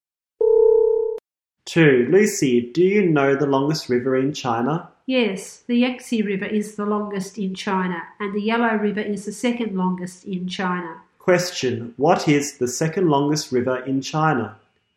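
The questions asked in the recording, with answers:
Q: what is the second longest river in China?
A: The Yellow River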